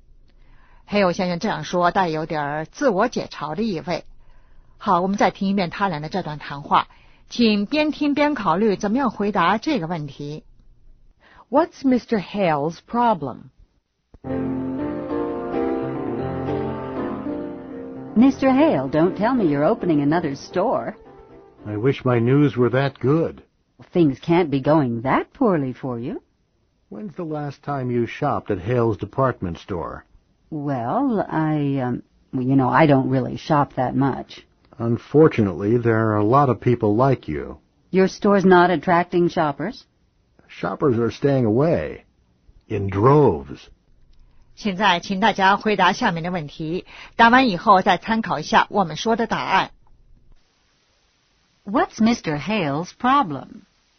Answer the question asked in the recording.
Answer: Shoppers are staying away.